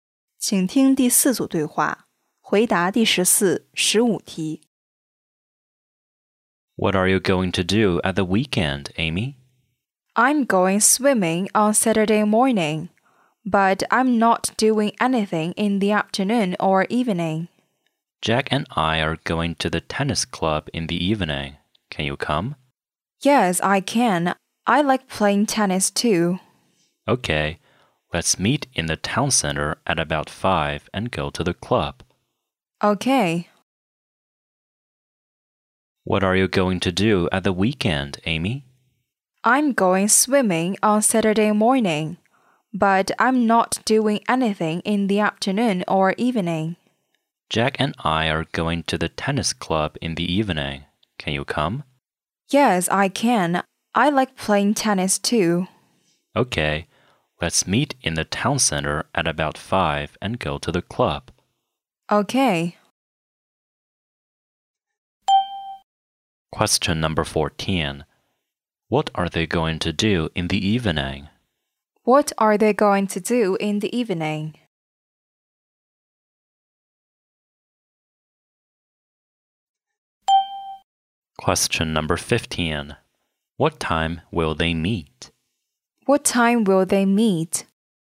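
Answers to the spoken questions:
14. Play tennis at the tennis club
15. At about 5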